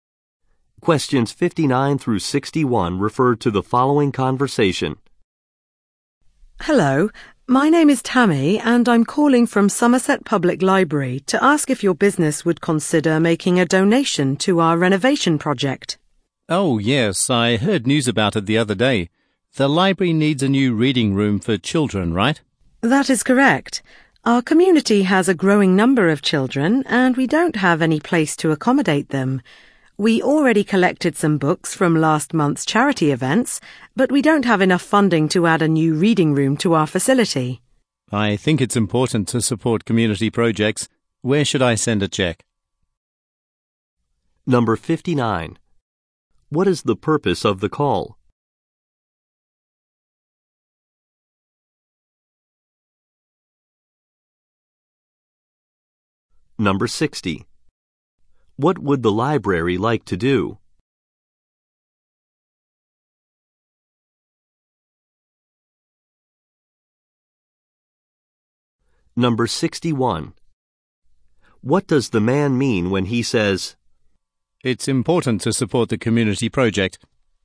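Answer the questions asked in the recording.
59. To ask for a donation
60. Add a children's reading room
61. He is willing to donate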